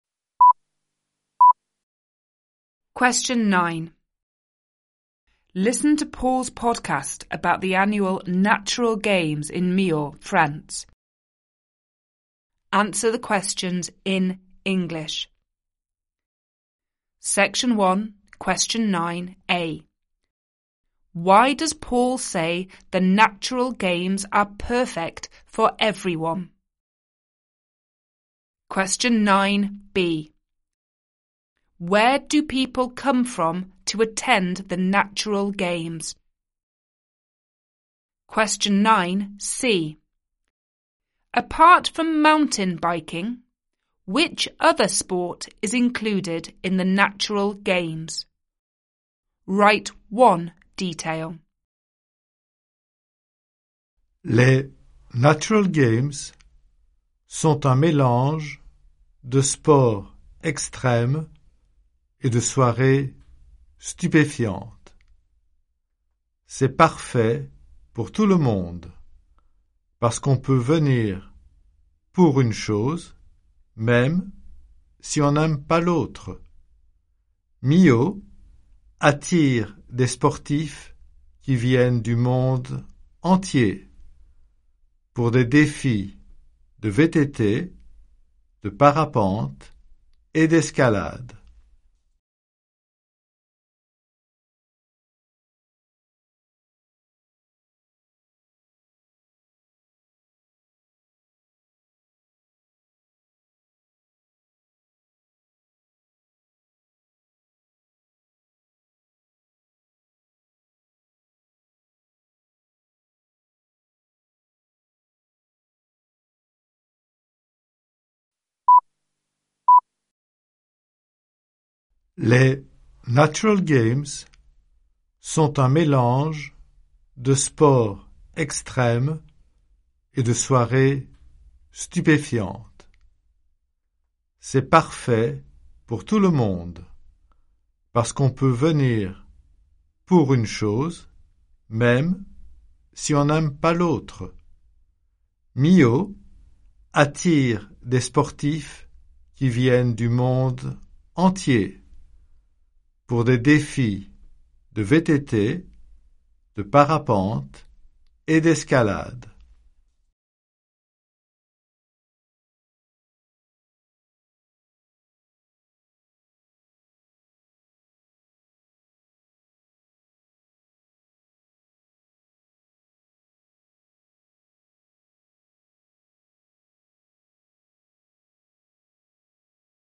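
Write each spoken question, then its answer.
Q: Why does Paul say the natural games are perfect for everyone?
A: You can come for one thing even if you don't like the other

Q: Where do people come from to attend the natural games?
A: All over the world

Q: Apart from mountain biking, which other sport is included in the natural games?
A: Paragliding or climbing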